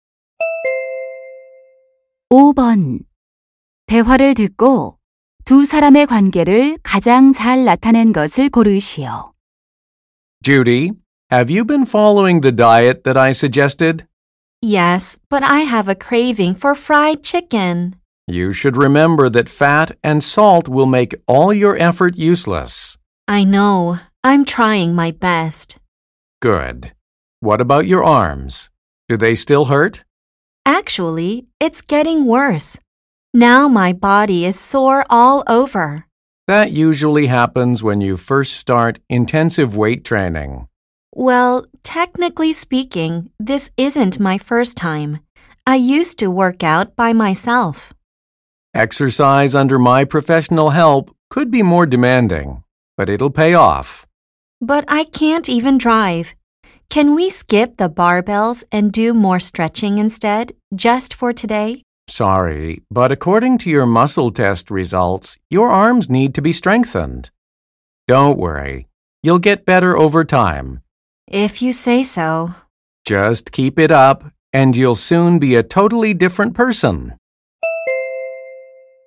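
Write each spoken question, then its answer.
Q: 대화를 듣고 두 사람의 관계를 가장 잘 나타낸 것을 고르시오.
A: 개인 트레이너 - 회원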